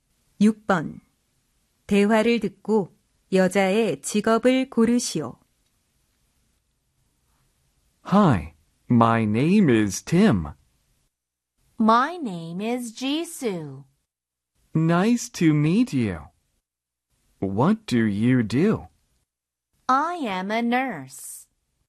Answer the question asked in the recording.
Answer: Nurse는 무엇일까요? 네, 바로 간호사입니다.